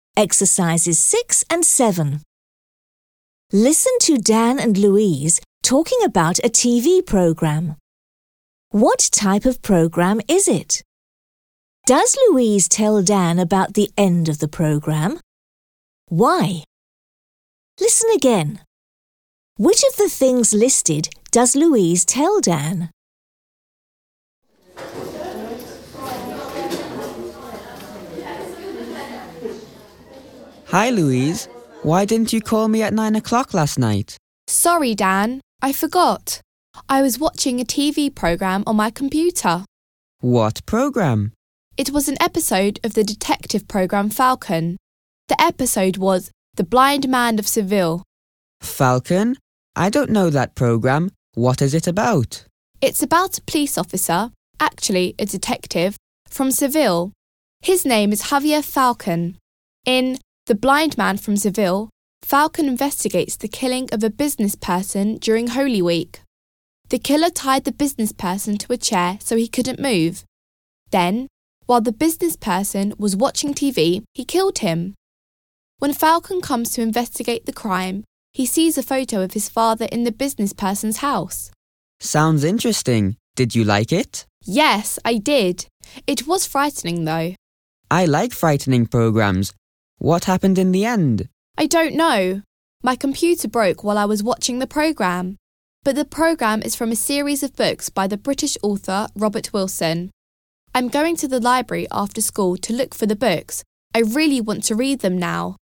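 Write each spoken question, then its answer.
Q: What type of program is it?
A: A detective program

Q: Does Louise tell Dan about the end of the program?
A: No, because her computer broke while she was watching it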